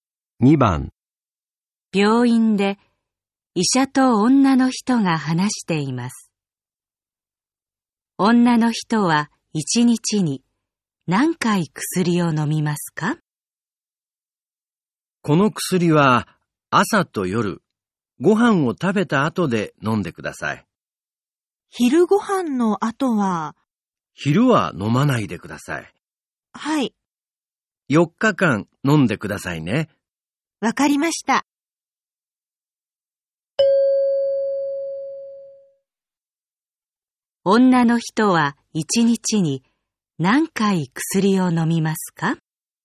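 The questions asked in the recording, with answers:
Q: 女の人は1日に何回薬を飲みますか?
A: 2回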